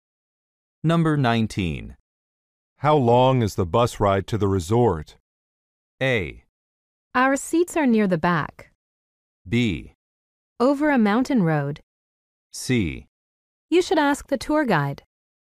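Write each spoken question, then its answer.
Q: How long is the bus ride to the resort?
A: C: You should ask the tour guide.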